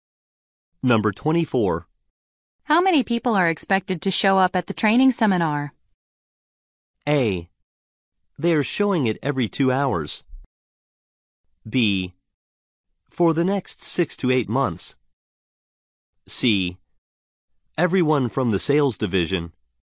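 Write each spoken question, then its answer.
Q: How many people are expected to show up at the training seminar?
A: C: Everyone from the sales division.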